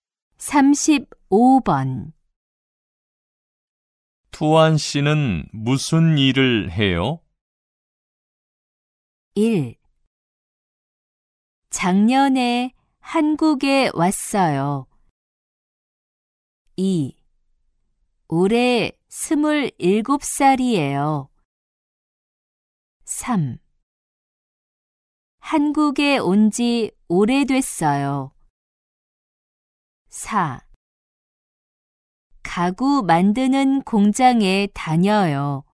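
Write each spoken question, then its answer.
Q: 투안 씨는 무슨 일을 해요?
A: 4: 가구 만드는 공장에 다녀요.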